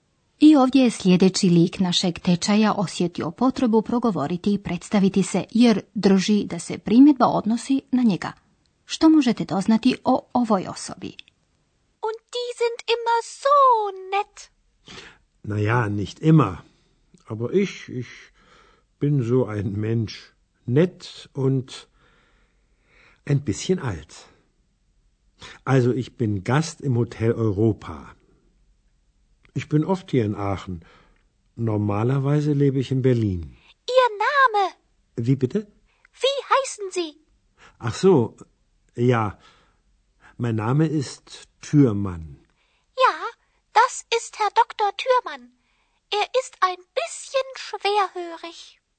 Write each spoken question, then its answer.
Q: Što možete doznati o ovoj osobi?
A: Puno ste toga odjednom doznali o doktoru Thürmannu, zar ne?